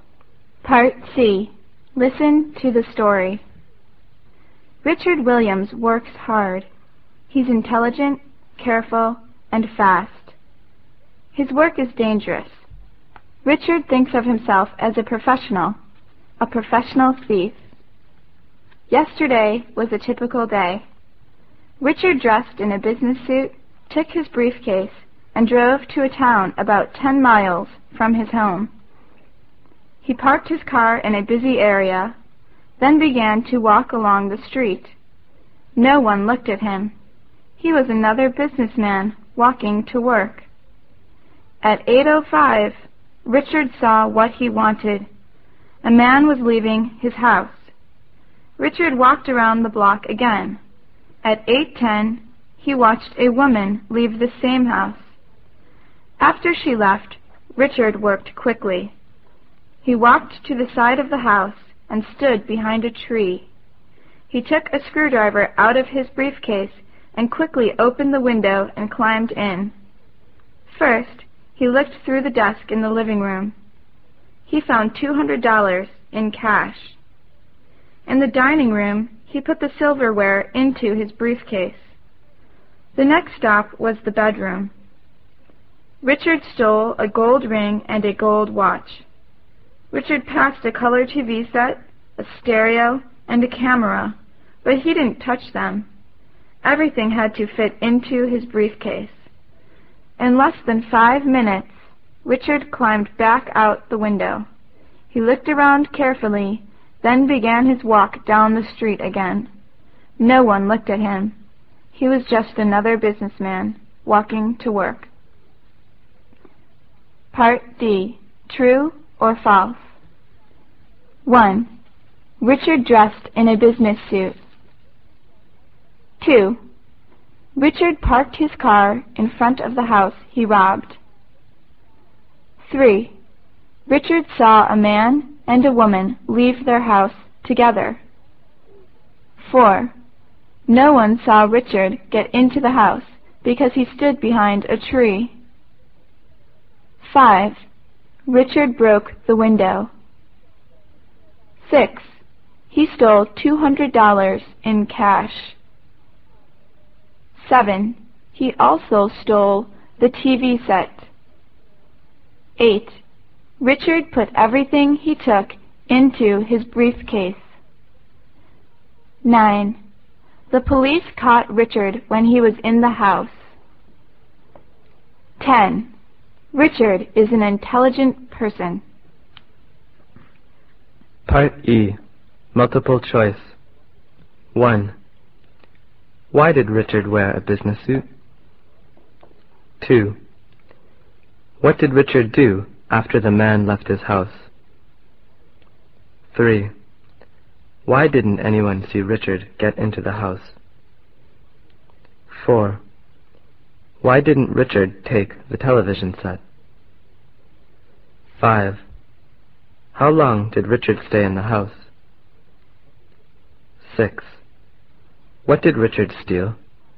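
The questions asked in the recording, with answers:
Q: Richard dressed in a business suit.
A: True

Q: Richard parked his car in front of the house he robbed.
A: False

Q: Richard saw a man and a woman leave their house together.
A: False

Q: Richard broke the window.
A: False

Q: He stole $200 in cash.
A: True

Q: He also stole the TV set.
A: False

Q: Richard put everything he took into his briefcase.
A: True

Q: The police caught Richard when he was in the house.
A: False

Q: Richard is an intelligent person.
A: True

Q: Why did Richard wear a business suit?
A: So he would look like another businessman and no one would notice him

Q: What did Richard do after the man left his house?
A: He walked around the block again

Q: Why didn't anyone see Richard get into the house?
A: He stood behind a tree at the side of the house

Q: Why didn't Richard take the television set?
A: Everything had to fit into his briefcase

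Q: How long did Richard stay in the house?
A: Less than 5 minutes

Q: What did Richard steal?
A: $200 in cash, the silverware, a gold ring and a gold watch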